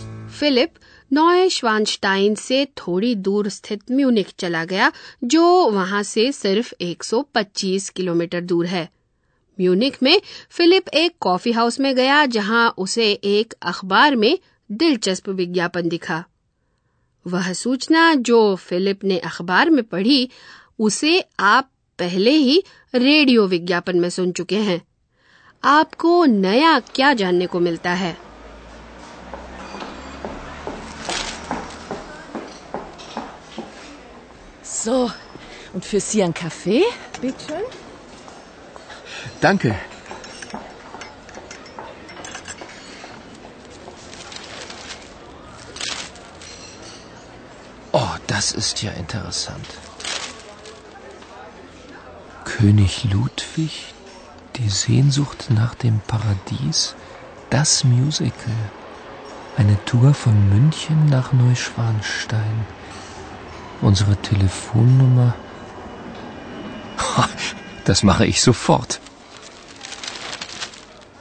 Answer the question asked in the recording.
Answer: आपके लिए नई सूचना ये है कि Munich से नॉयशवानस्टाइन महल के लिए एक खास टूर पर जाया जा सकता है